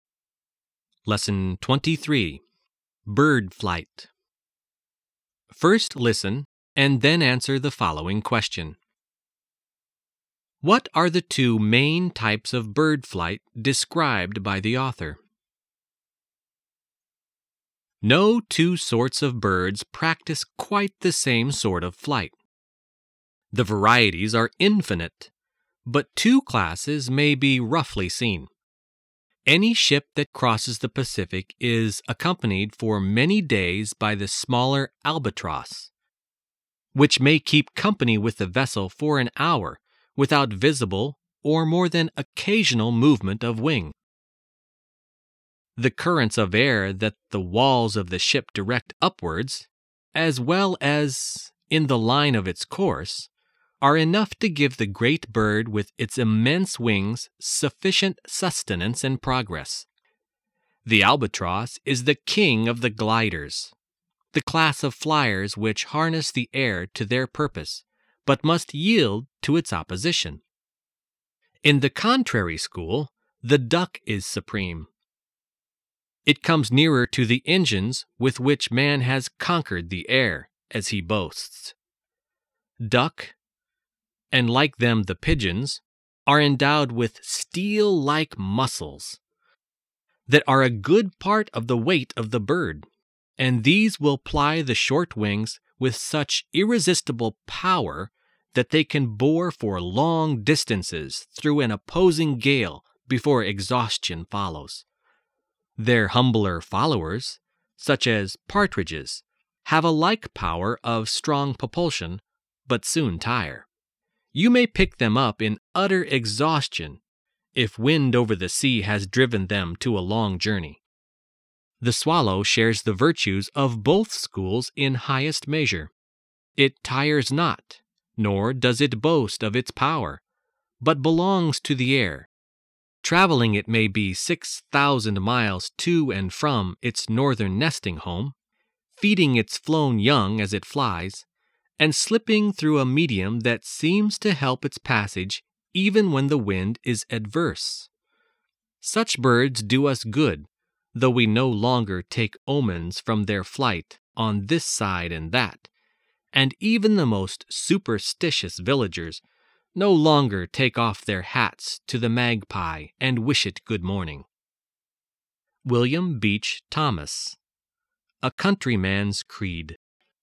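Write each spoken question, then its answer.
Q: What are the two main types of bird flight described by the author?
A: Gliding (like the albatross, using air currents) and powered flapping flight (like the duck, with strong muscles driving short wings)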